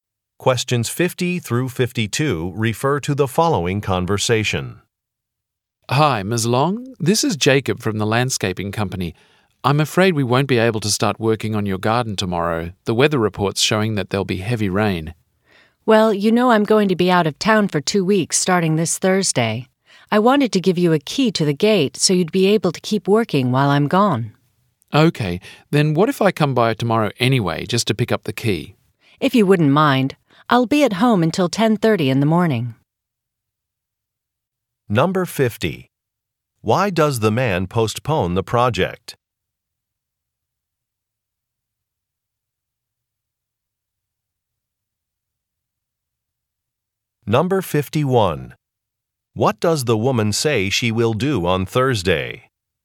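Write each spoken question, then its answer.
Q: Why does the man postpone the project?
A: Heavy rain is expected

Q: What does the woman say she will do on Thursday?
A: Go out of town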